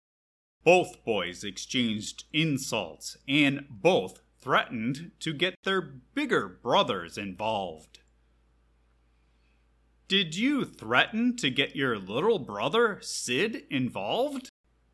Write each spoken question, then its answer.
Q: Did you threaten to get your little brother, Sid, involved?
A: No, I did not threaten to get my little brother, Sid.